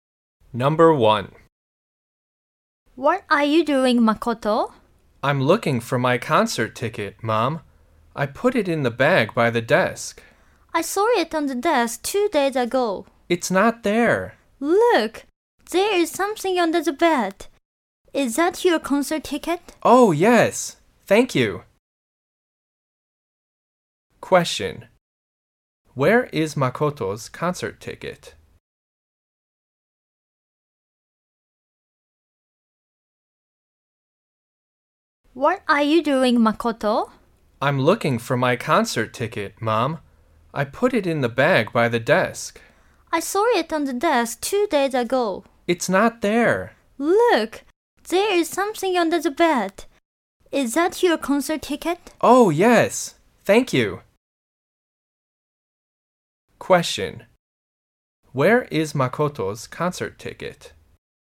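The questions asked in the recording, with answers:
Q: Where is Makoto's concert ticket?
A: Under the bed.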